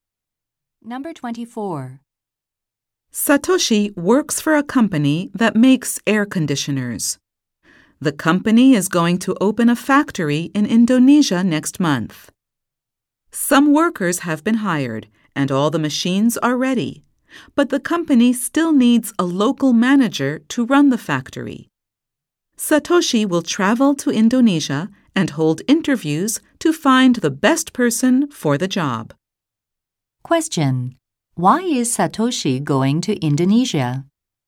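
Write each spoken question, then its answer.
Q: Why is Satoshi going to Indonesia?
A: To interview people for a local factory manager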